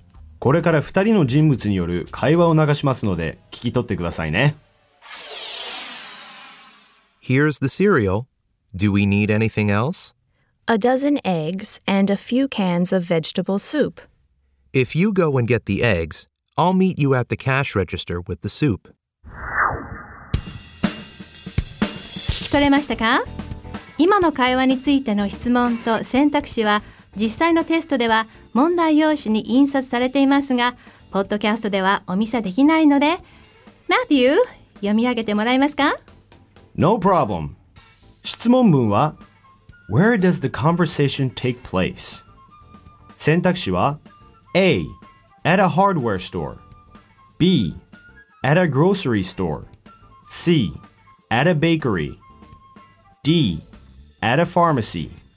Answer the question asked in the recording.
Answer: B の grocery store となります。